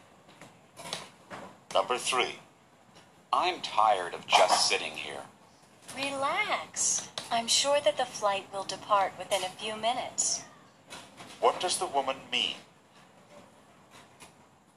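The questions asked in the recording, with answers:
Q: What does the woman mean?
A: The flight will leave soon.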